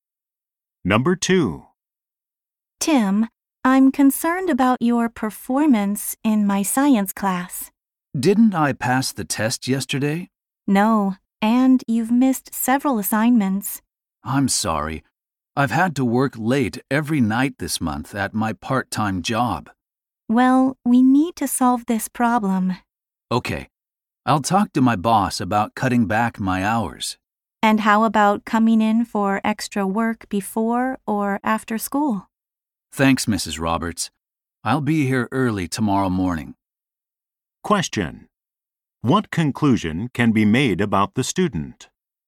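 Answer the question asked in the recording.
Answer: His part-time job is hurting his schoolwork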